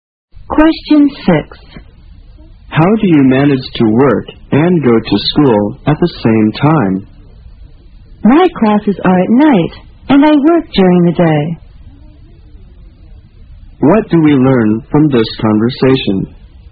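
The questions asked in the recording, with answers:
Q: What do we learn from this conversation?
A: The speaker works during the day and takes classes at night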